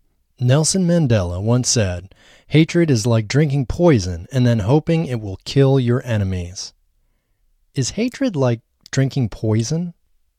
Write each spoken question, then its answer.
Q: Is hatred like drinking poison?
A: Yes, hatred is like drinking poison.